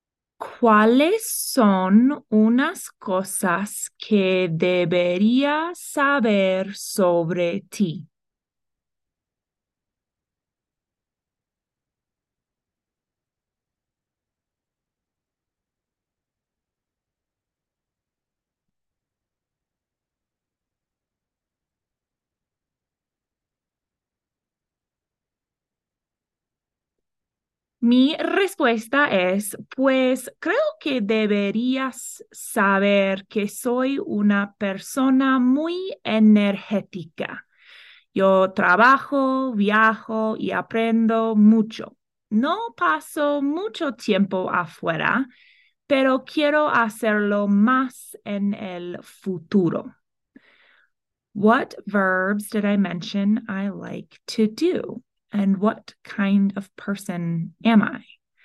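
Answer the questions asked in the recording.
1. Work, travel and learn (trabajo, viajo, aprendo)
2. A very energetic person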